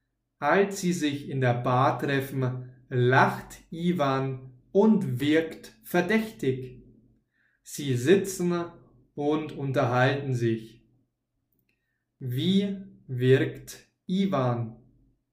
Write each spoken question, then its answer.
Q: Wie wirkt Ivan?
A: Verdächtig. Er wirkt verdächtig.